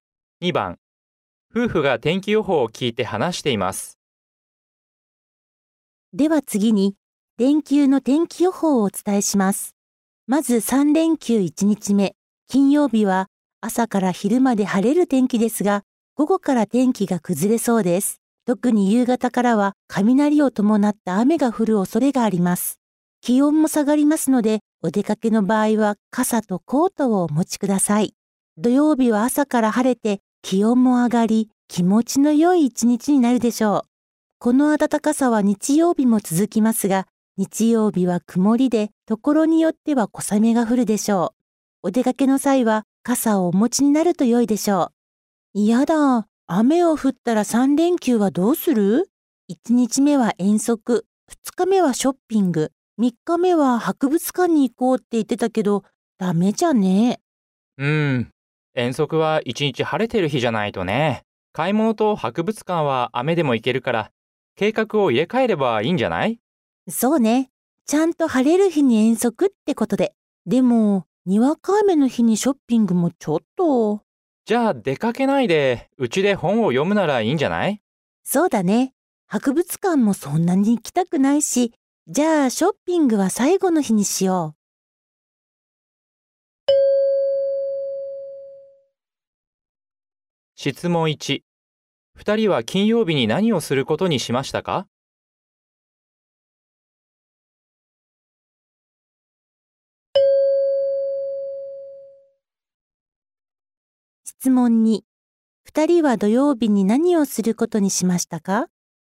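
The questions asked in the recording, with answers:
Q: 2人は土曜日に何をすることにしましたか?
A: 遠足に行く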